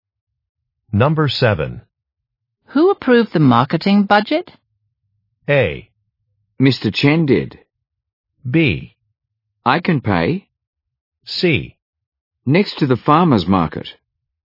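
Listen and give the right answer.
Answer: A: Mr. Chen did.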